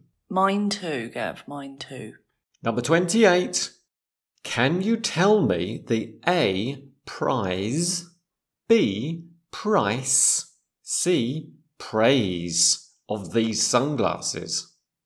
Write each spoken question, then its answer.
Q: Can you tell me the A, prize, B, price, C, praise of these sunglasses?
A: B, price. Can you tell me the price of these sunglasses?